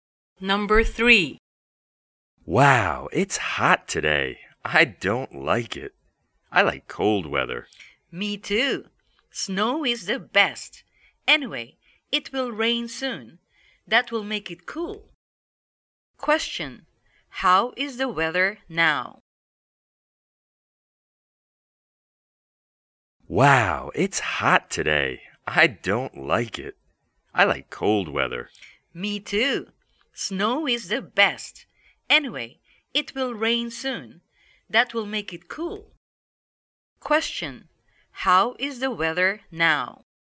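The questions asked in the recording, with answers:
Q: Question. How is the weather now?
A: It is hot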